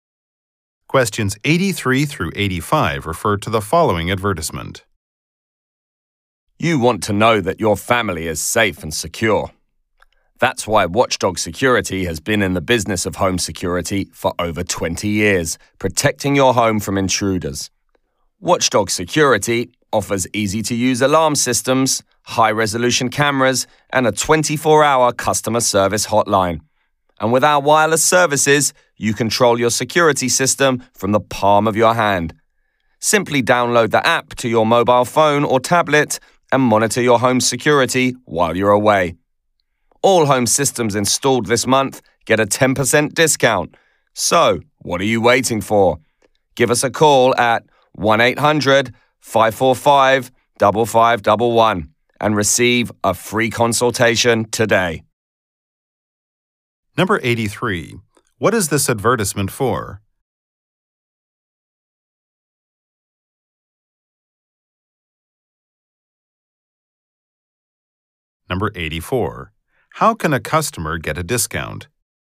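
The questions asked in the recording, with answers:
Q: What is this advertisement for?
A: Home security systems

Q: How can a customer get a discount?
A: Have a system installed this month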